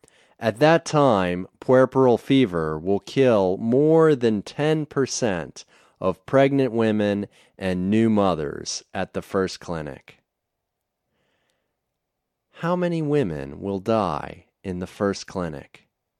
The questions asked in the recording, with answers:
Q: How many women will die in the first clinic?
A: Ten percent of women will die in the first clinic.